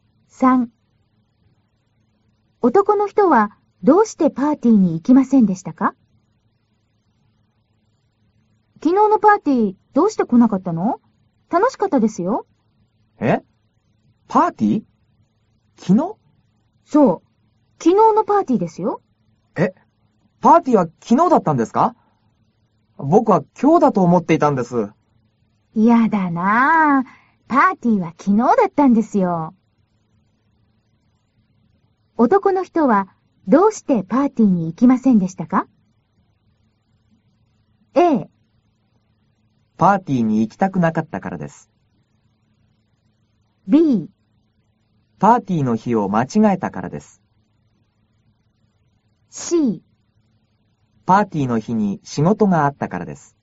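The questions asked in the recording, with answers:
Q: 男の人はどうしてパーティーに行きませんでしたか?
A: B: パーティーの日を間違えたからです。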